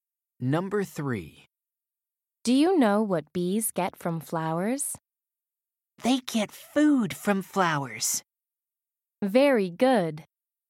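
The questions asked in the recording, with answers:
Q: Do you know what bees get from flowers?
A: food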